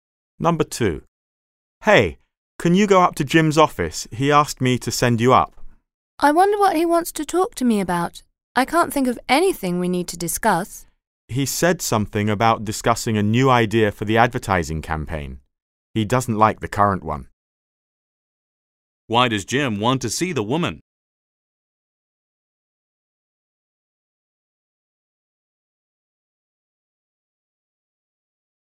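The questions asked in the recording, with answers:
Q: Why does Jim want to see the woman?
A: To discuss a new idea for the advertising campaign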